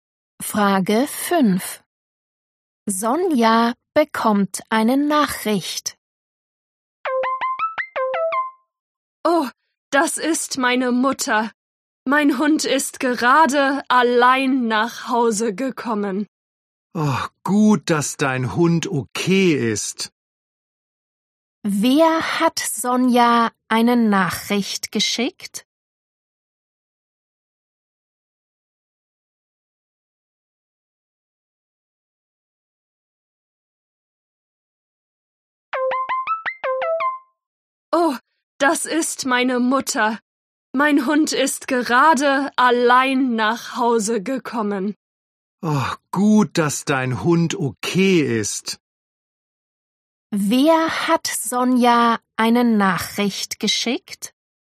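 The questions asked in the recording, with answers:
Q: Wer hat Sonja eine Nachricht geschickt?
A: ihre Mutter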